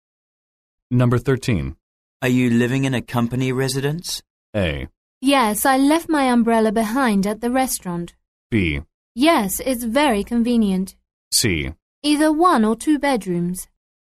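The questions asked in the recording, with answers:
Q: Are you living in a company residence?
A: B: Yes, it's very convenient.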